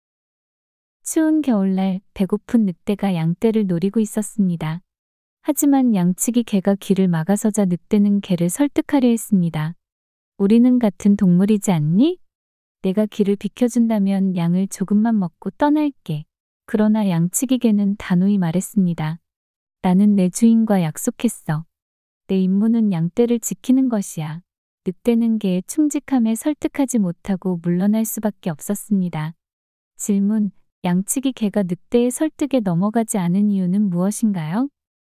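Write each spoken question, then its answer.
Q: 양치기 개가 늑대의 설득에 넘어가지 않은 이유는 무엇인가요?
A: 주인과 양떼를 지키기로 약속했기 때문에 (충직함)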